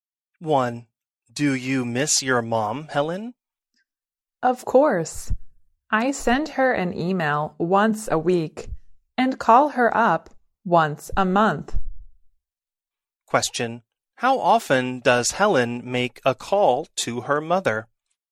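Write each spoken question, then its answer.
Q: How often does Helen make a call to her mother?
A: Once a month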